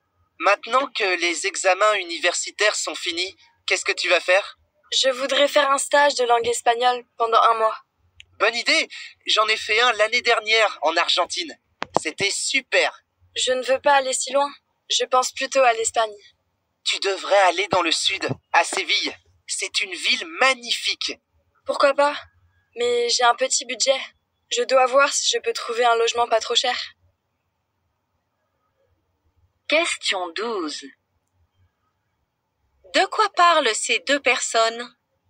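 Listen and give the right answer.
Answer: D'un projet de stage de langue espagnole en Espagne (après les examens)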